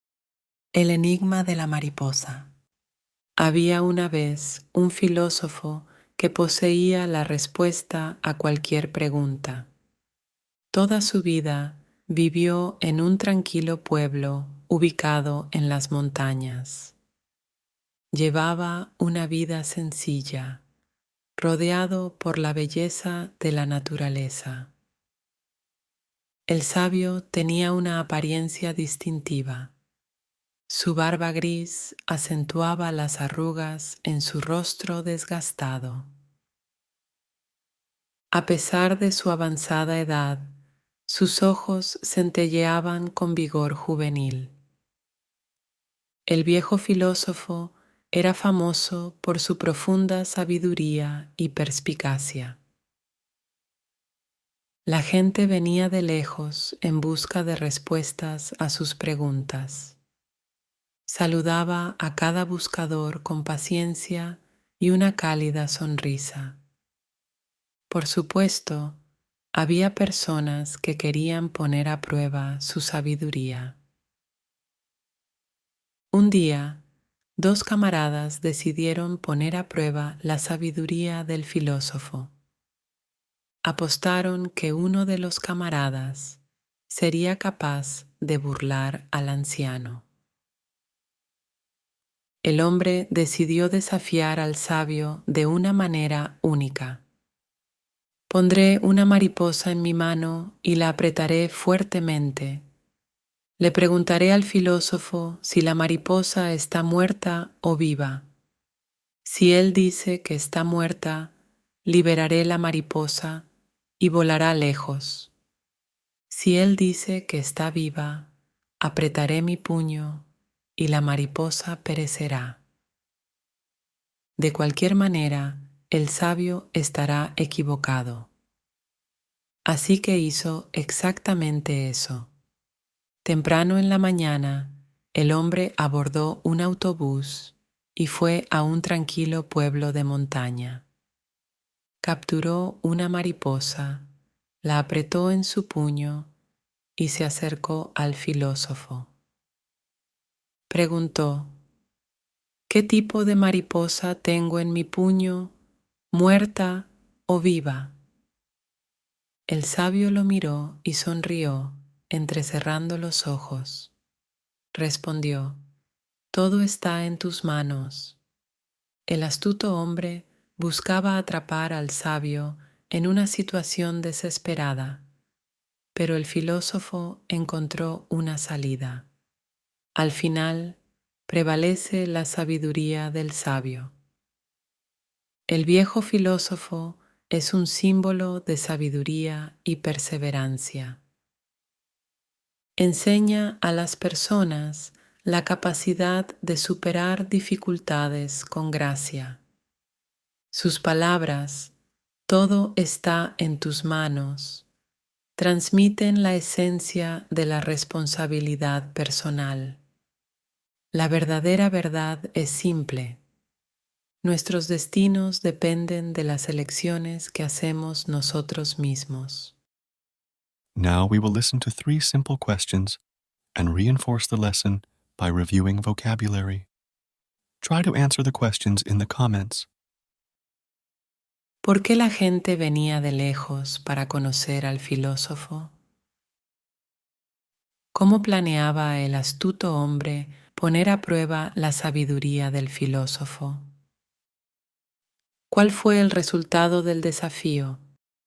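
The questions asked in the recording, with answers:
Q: ¿Por qué la gente venía de lejos para conocer al filósofo?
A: En busca de respuestas a sus preguntas, por su profunda sabiduría

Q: ¿Cómo planeaba el astuto hombre poner a prueba la sabiduría del filósofo?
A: Con una mariposa en el puño, preguntándole si estaba muerta o viva

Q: ¿Cuál fue el resultado del desafío?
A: El filósofo respondió «Todo está en tus manos» y prevaleció su sabiduría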